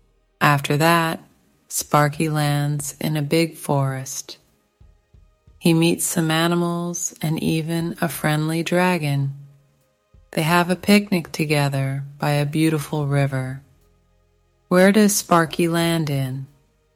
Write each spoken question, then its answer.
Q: Where does Sparky land in?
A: A big forest. He lands in a big forest.